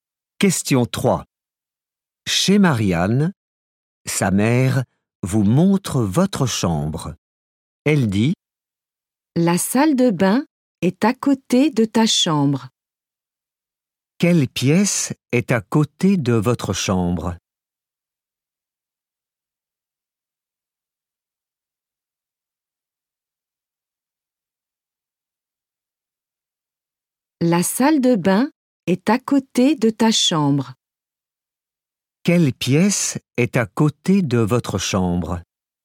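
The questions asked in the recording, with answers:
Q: Quelle pièce est à côté de votre chambre ?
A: La salle de bain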